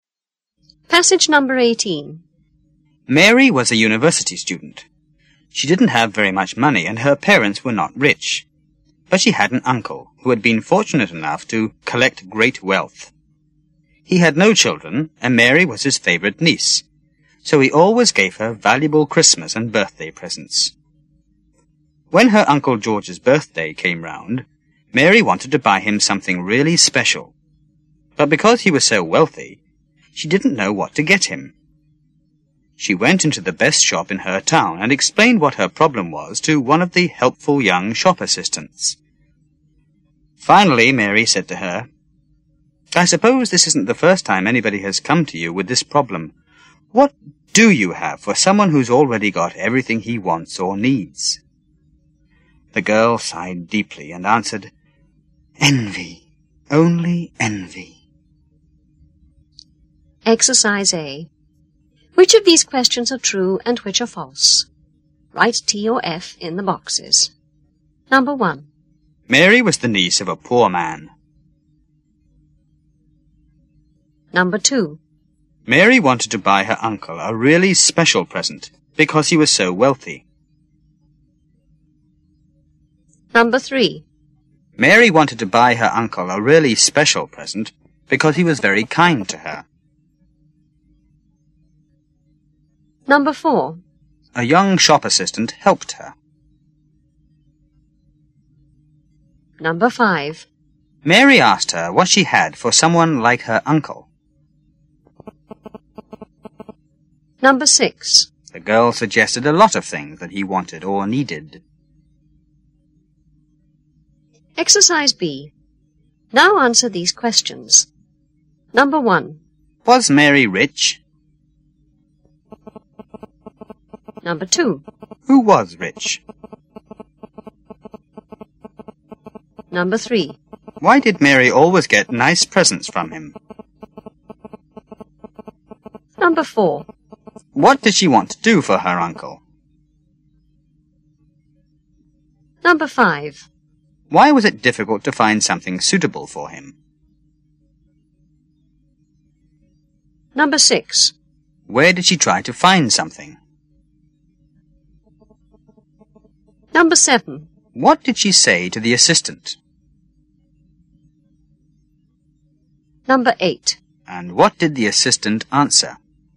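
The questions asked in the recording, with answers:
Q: Was Mary rich?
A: No, she wasn't.

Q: Who was rich?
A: Her Uncle George.

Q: Why did Mary always get nice presents from him?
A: He had no children and she was his favorite niece.

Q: What did she want to do for her uncle?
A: Buy him something really special for his birthday.

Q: Why was it difficult to find something suitable for him?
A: Because he was so wealthy.

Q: Where did she try to find something?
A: In the best shop in her town.

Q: What did she say to the assistant?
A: What do you have for someone who's already got everything he wants or needs?

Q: And what did the assistant answer?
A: Envy, only envy.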